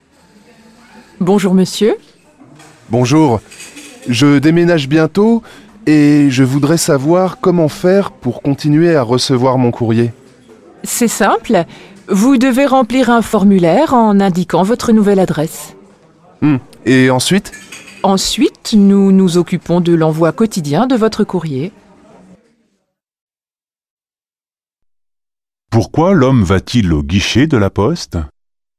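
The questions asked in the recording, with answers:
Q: Pourquoi l'homme va-t-il au guichet de la poste ?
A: Parce qu'il déménage et veut continuer à recevoir son courrier à sa nouvelle adresse.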